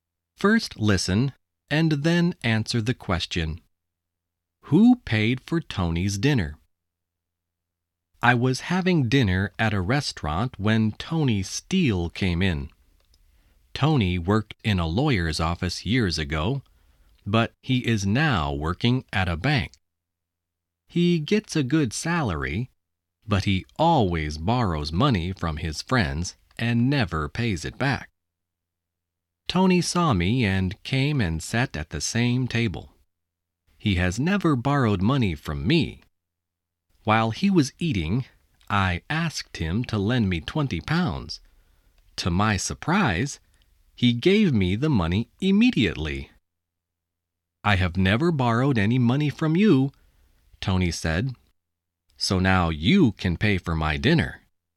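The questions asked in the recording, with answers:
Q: Who paid for Tony's dinner?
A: The narrator (the writer) paid for it.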